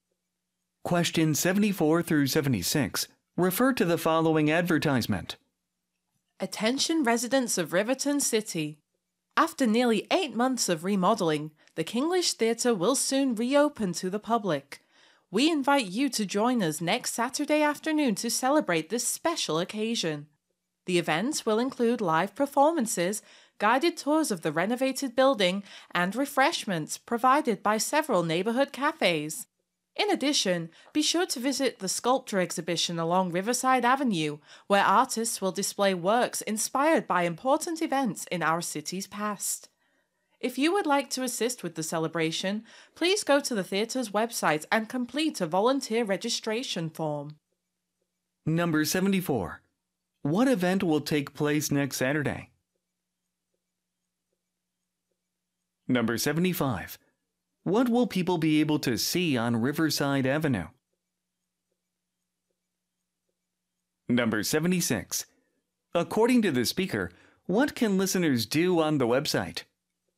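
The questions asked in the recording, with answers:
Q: What event will take place next Saturday?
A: A celebration of the theatre's reopening

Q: What will people be able to see on Riverside Avenue?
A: A sculpture exhibition about important events in the city's past

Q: According to the speaker, what can listeners do on the website?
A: Fill out a volunteer registration form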